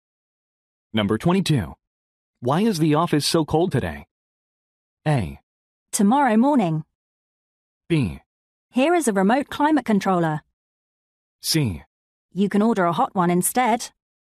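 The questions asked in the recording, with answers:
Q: Why is the office so cold today?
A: B: Here is a remote climate controller.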